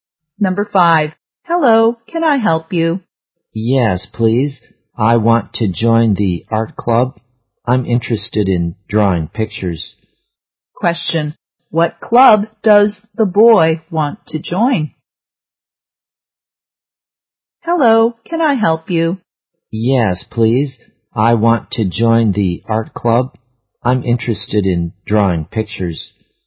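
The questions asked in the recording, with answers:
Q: Question. What club does the boy want to join?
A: The art club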